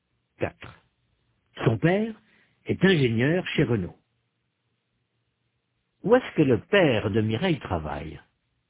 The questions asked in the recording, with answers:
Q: Où est-ce que le père de Mireille travaille?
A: Chez Renault.